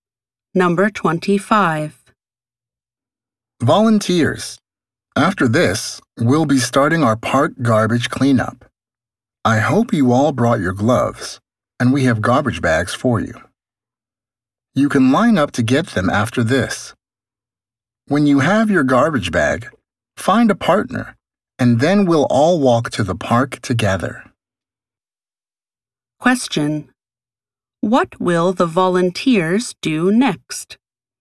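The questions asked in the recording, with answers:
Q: What will the volunteers do next?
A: Line up to get garbage bags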